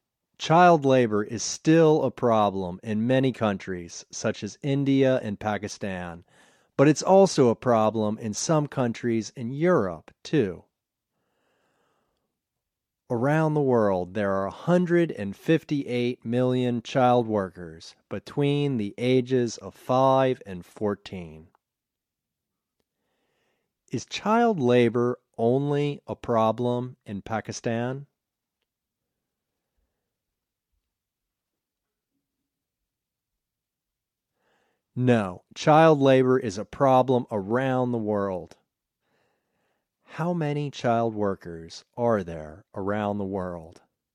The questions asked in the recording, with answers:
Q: How many child workers are there around the world?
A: There are 158 million child workers around the world.